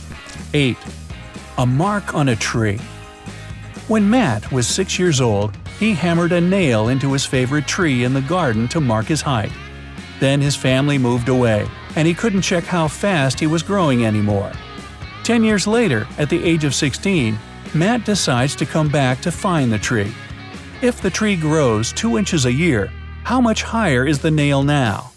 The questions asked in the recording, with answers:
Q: If the tree grows 2 inches a year, how much higher is the nail now?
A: Nail's going to be at the same height.